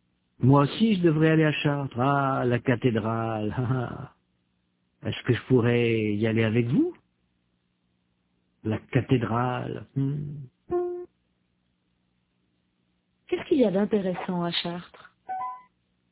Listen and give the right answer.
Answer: La cathédrale.